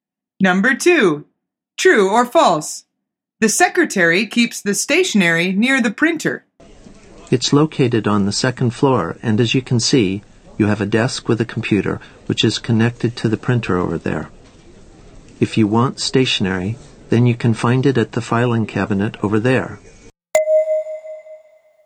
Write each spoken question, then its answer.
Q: The secretary keeps the stationery near the printer.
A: The answer is false. Stationery is kept near the filing cabinet.